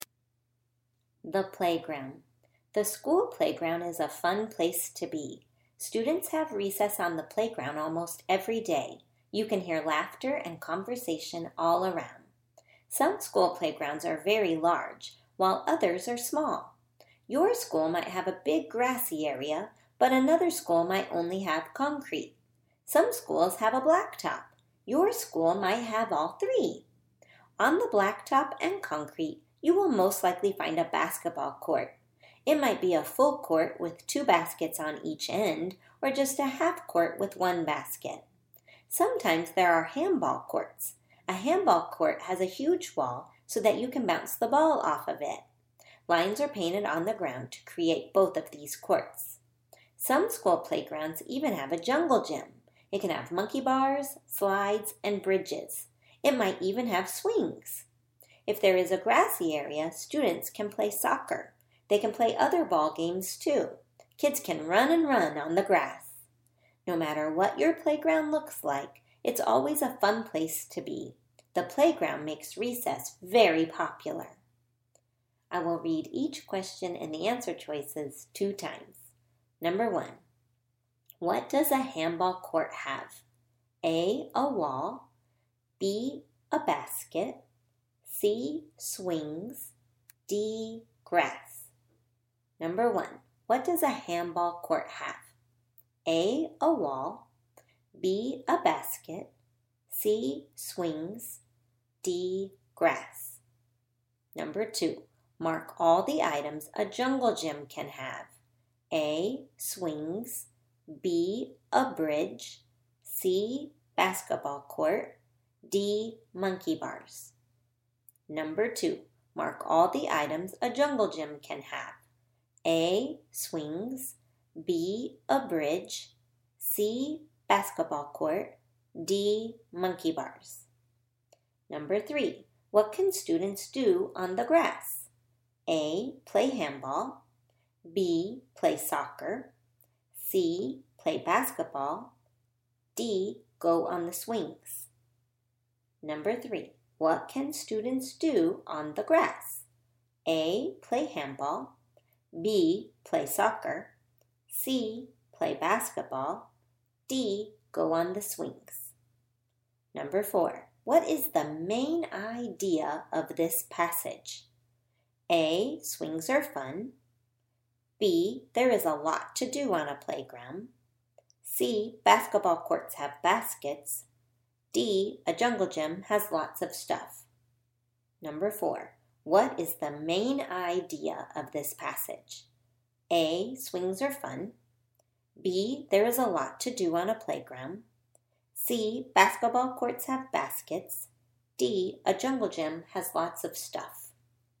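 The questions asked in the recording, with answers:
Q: what does a handball court have?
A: A: a wall

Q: mark all the items a jungle gym can have.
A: A: swings, B: a bridge, D: monkey bars

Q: what can students do on the grass?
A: B: play soccer

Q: what is the main idea of this passage?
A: B: there is a lot to do on a playground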